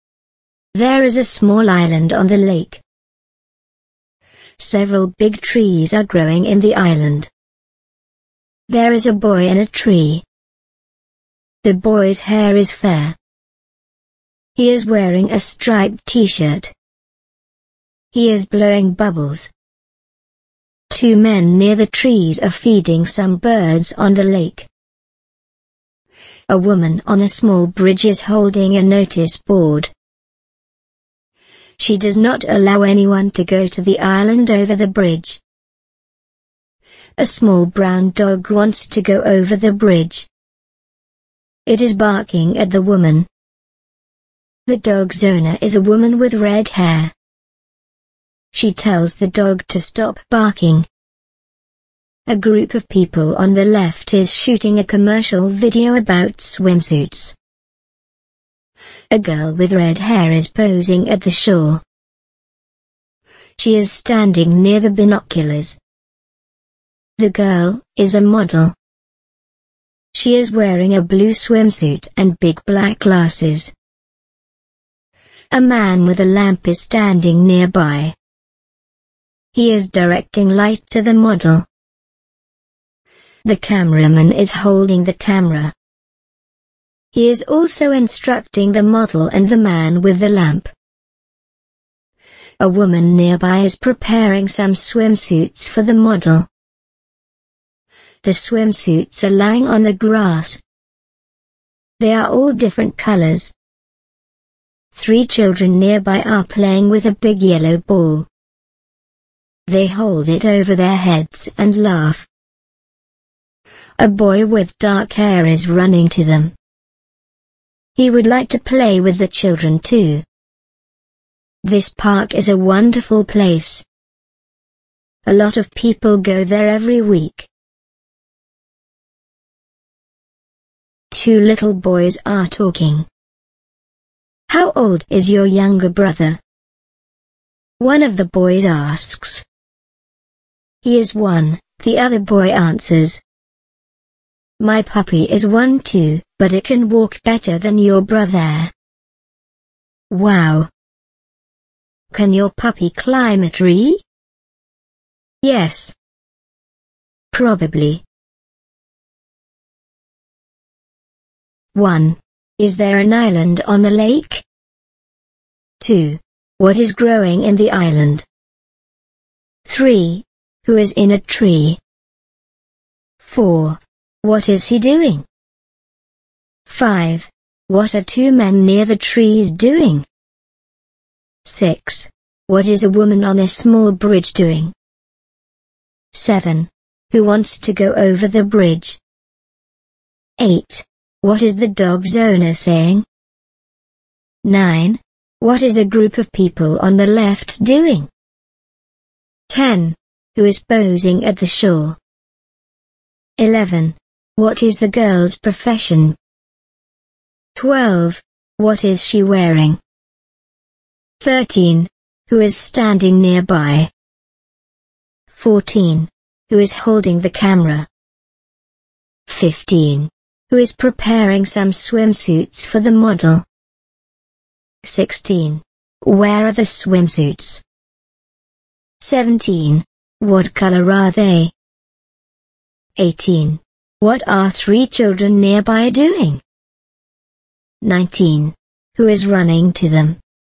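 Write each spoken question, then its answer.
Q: Is there an island on the lake?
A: Yes, there is a small island on the lake.

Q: What is growing in the island?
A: Several big trees

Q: Who is in a tree?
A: A boy with fair hair in a striped t-shirt

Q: What is he doing?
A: Blowing bubbles

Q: What are two men near the trees doing?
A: Feeding some birds on the lake

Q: What is a woman on a small bridge doing?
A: Holding a notice board and not allowing anyone onto the island

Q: Who wants to go over the bridge?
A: A small brown dog

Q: What is the dog's owner saying?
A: She tells the dog to stop barking.

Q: What is a group of people on the left doing?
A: Shooting a commercial video about swimsuits

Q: Who is posing at the shore?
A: A girl with red hair

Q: What is the girl's profession?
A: She is a model.

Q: What is she wearing?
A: A blue swimsuit and big black glasses

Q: Who is standing nearby?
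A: A man with a lamp

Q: Who is holding the camera?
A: The cameraman

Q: Who is preparing some swimsuits for the model?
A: A woman nearby

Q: Where are the swimsuits?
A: On the grass

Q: What color are they?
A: They are all different colors.

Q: What are three children nearby doing?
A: Playing with a big yellow ball

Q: Who is running to them?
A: A boy with dark hair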